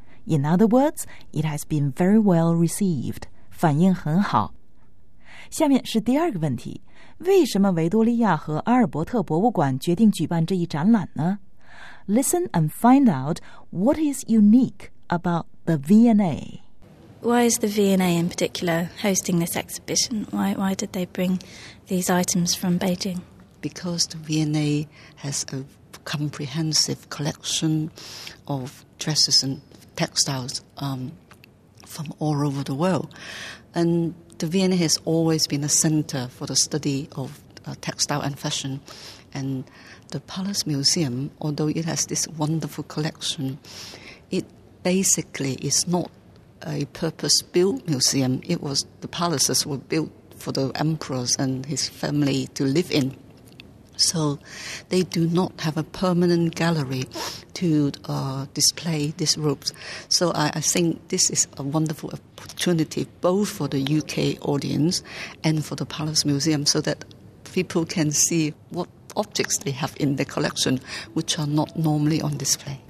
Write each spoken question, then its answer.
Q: Listen and find out what is unique about the V&A.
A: 听出来了吗?The V&A 一直是纺织时装研究的中心,女裙和纺织品收集齐全,而故宫没有专门的永久性的展厅。